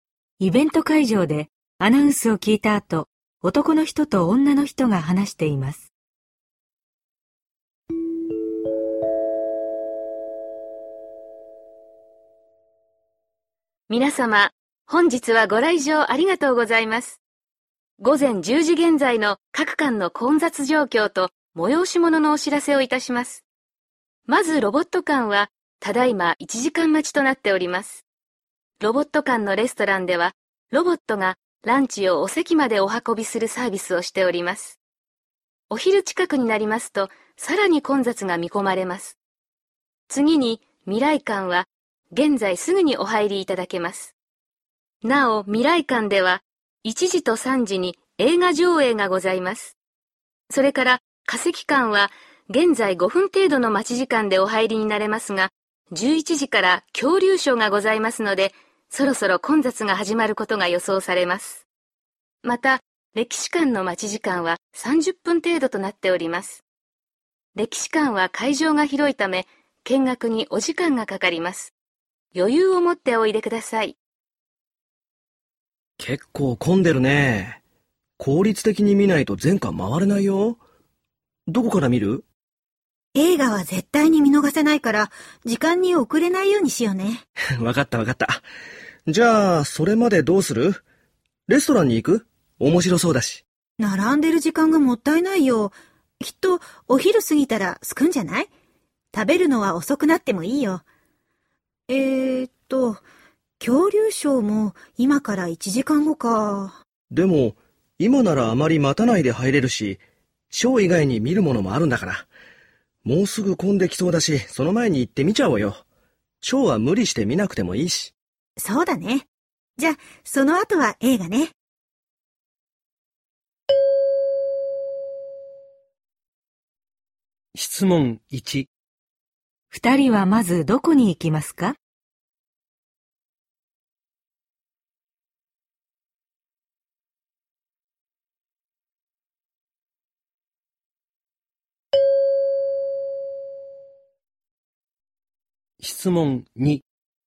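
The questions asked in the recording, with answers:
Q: 二人はまずどこに行きますか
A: 化石館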